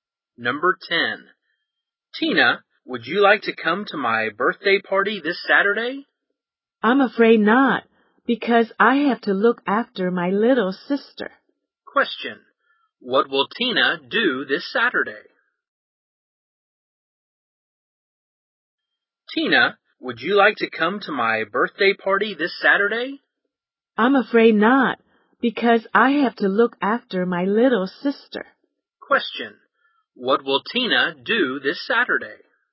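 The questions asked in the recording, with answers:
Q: What will Tina do this Saturday?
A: Look after her little sister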